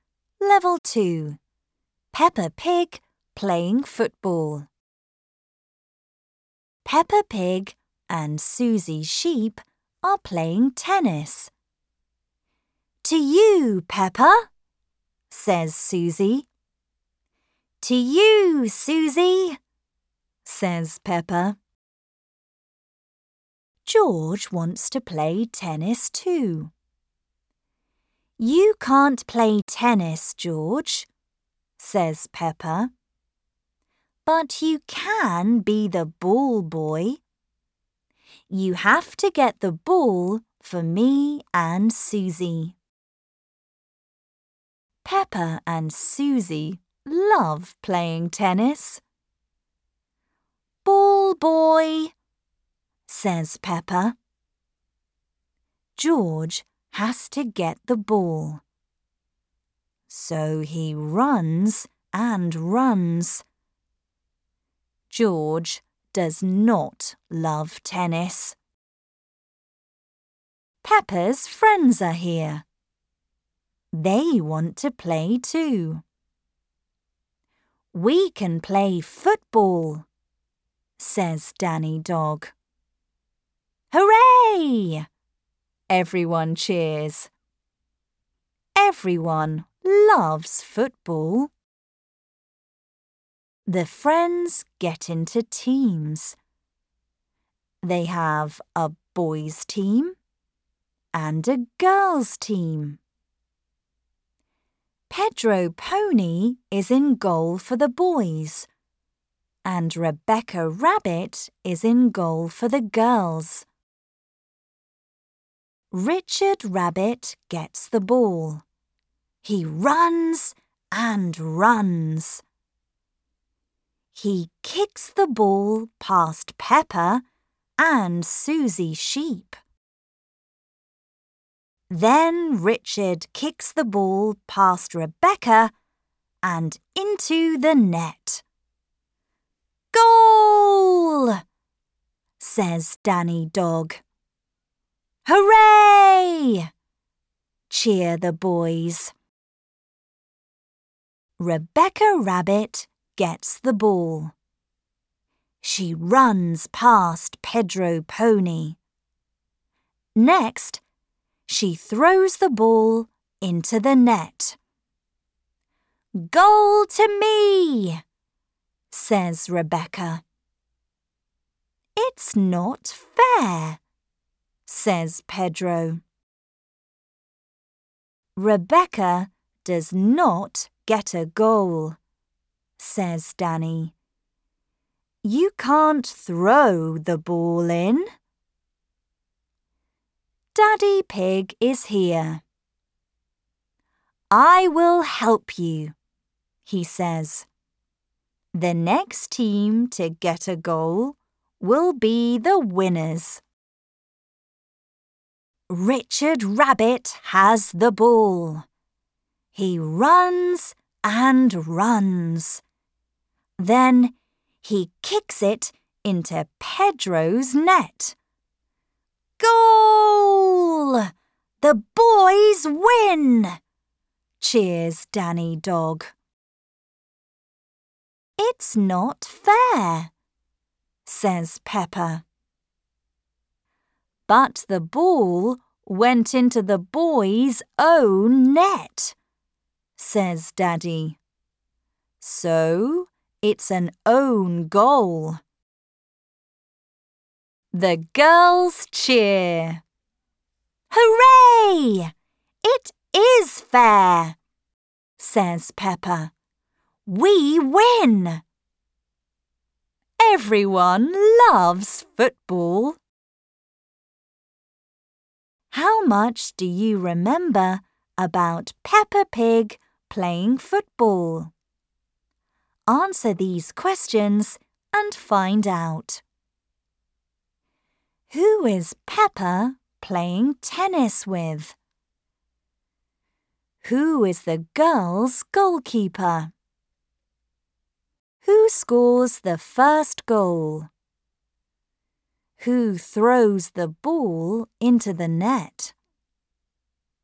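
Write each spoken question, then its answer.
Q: Who is Peppa playing tennis with?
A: Susie Sheep

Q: Who is the girls' goalkeeper?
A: Rebecca Rabbit

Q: Who scores the first goal?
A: Richard Rabbit

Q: Who throws the ball into the net?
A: Rebecca Rabbit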